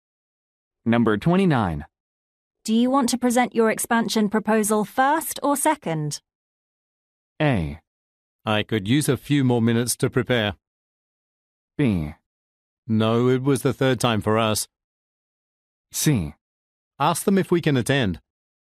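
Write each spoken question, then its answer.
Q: Do you want to present your expansion proposal first or second?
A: A: I could use a few more minutes to prepare.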